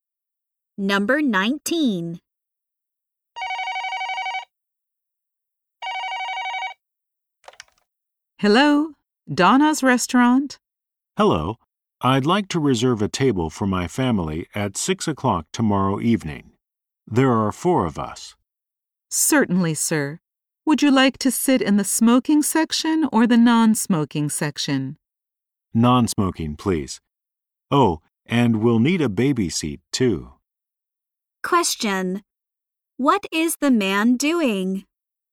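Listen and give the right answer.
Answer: Reserving a table at a restaurant.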